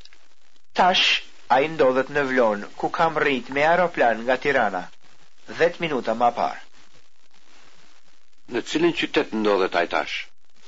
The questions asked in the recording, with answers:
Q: Në cilin qytet ndodhet ai tash?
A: Tash, a i ndodhet në Vlon.